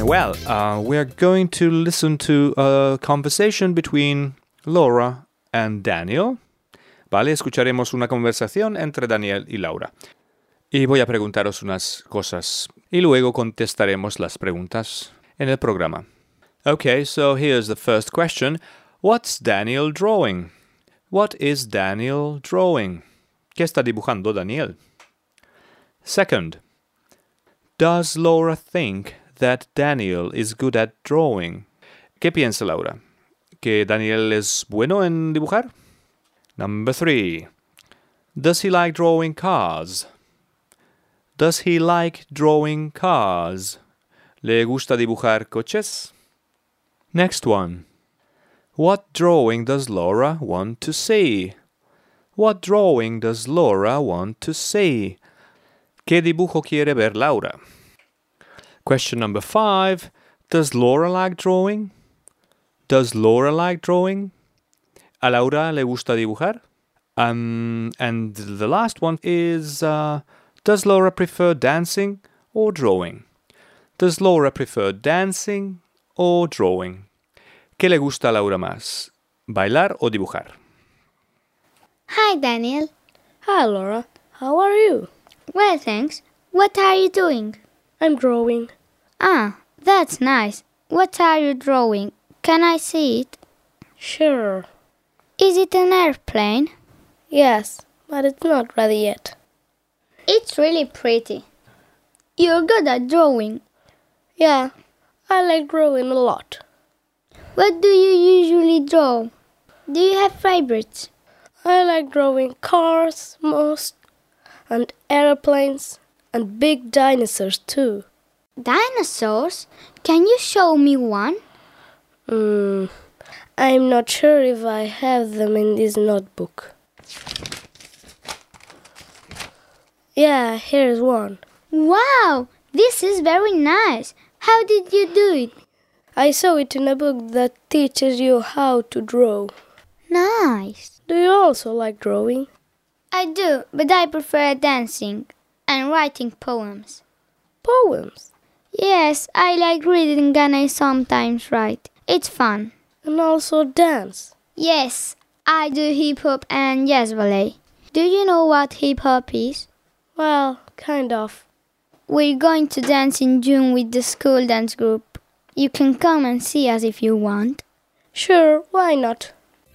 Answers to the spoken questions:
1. Yes, so Daniel is drawing an airplane.
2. Yes, she does.
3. Yes, he does. He definitely does.
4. She wants to see a dinosaur drawing.
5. Yes, she does. Laura likes drawing.
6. But she says, I prefer dancing.